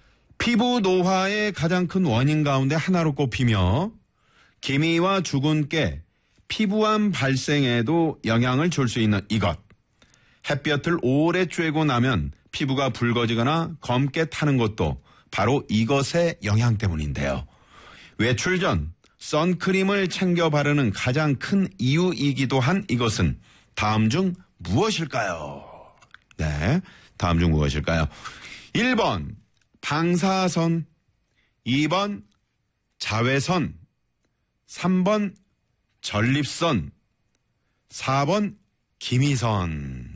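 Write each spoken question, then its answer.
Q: 외출 전 선크림을 챙겨 바르는 가장 큰 이유이기도 한 이것은 다음 중 무엇일까요?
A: 2: 자외선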